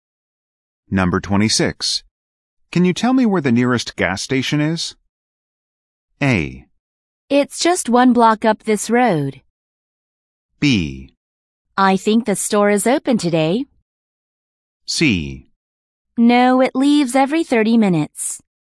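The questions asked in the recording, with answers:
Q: Can you tell me where the nearest gas station is?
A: A: It's just one block up this road.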